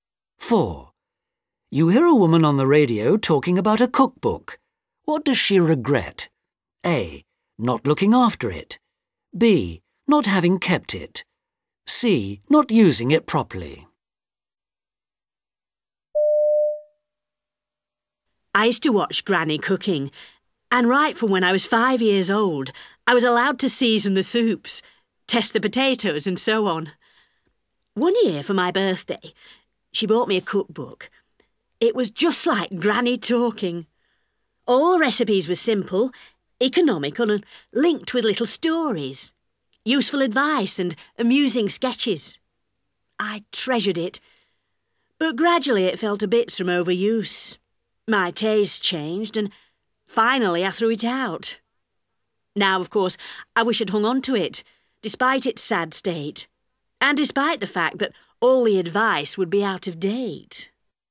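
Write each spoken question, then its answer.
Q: What does she regret?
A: B: Not having kept it.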